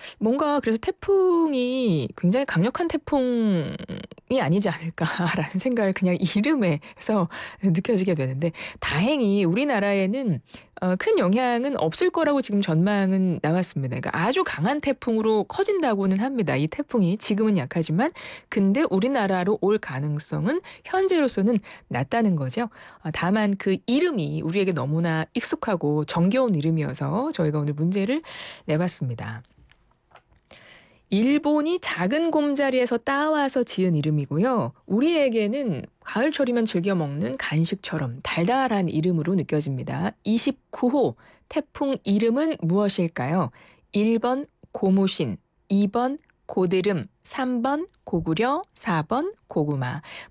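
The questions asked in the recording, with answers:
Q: 29호 태풍 이름은 무엇일까요? 1번 고무신, 2번 고드름, 3번 고구려, 4번 고구마.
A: 4: 고구마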